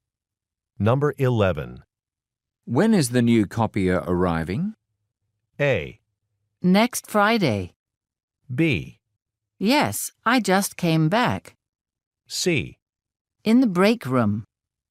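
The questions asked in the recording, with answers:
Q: When is the new copier arriving?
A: A: Next Friday.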